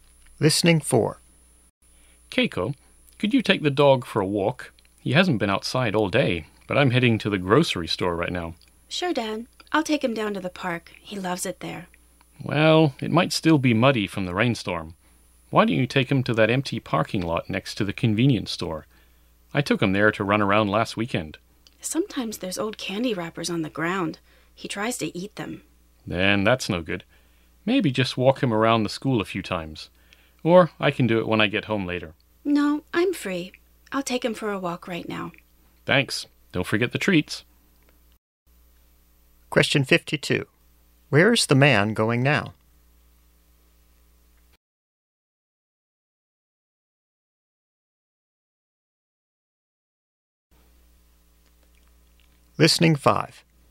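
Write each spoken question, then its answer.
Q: Where is the man going now?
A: To the grocery store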